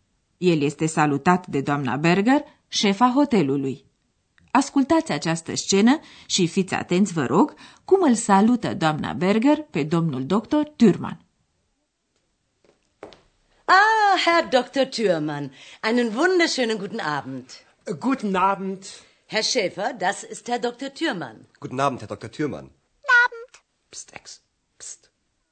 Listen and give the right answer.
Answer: Doamna Berger l-a salutat pe domnul doctor Thürmann, menționându-i titlul doctor și urându-i o minunată bună seară.